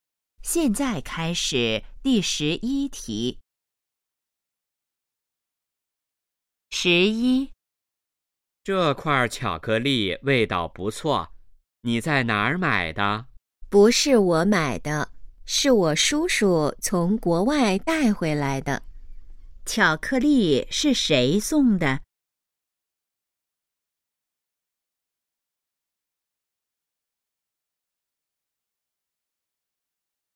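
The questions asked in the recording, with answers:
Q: 巧克力是谁送的?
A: 叔叔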